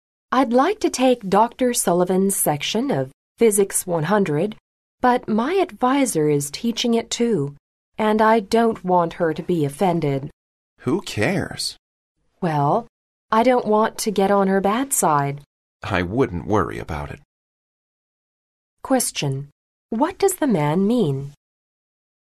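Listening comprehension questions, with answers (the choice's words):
What does the man mean?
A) The woman need not consider her advisor in her decision.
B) The woman should not take Dr. Sullivan's course.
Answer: The woman need not consider her advisor in her decision.

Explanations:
女士想选Dr. Sullivan的课,而她的导师也开此课,她便向男士征求意见,该对话中男士并未直接表达他的意见,但是由男士说的Who cares?可知,男士是告诉女士做决定时不用考虑导师。

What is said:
W: I'd like to take Dr. Sullivan's section of Physics 100, but my advisor is teaching it too, and I don't want her to be offended.
M: Who cares?
W: Well, I don't want to get on her bad side.
M: I wouldn't worry about it.
Q: What does the man mean?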